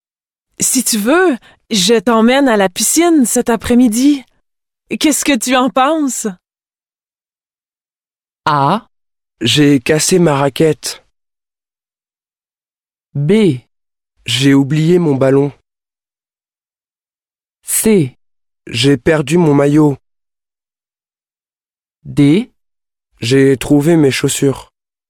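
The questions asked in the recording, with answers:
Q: Qu'est-ce que tu en penses?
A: C: J'ai perdu mon maillot.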